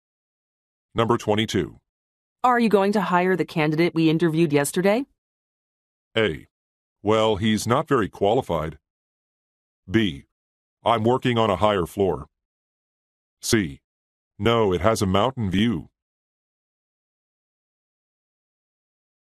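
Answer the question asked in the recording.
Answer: A: Well, he's not very qualified.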